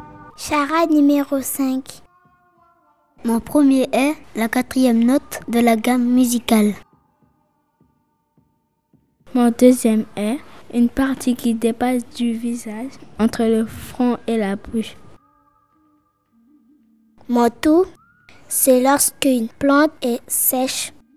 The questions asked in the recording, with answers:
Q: Mon tout, c'est lorsqu'une plante est sèche.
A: fanée.